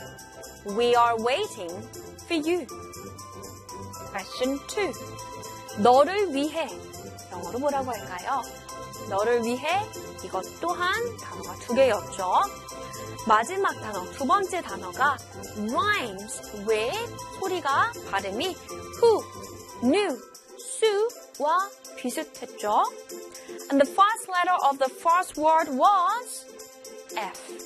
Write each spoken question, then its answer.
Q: 너를 위해. 영어로 뭐라고 할까요?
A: 너를 위해? For you.